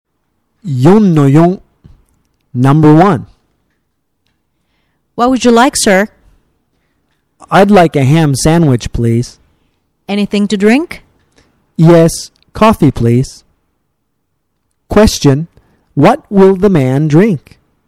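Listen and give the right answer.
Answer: Coffee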